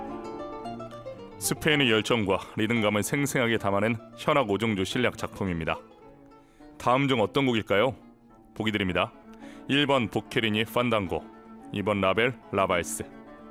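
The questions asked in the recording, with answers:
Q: 다음 중 어떤 곡일까요?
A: 1: 보케리니 판단고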